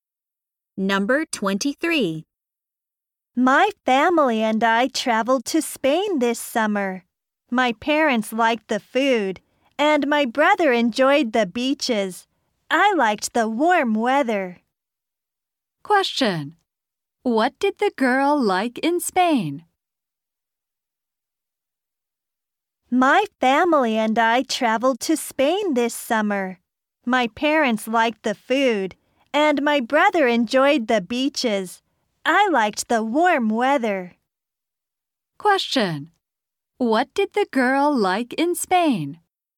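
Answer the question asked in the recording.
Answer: The warm weather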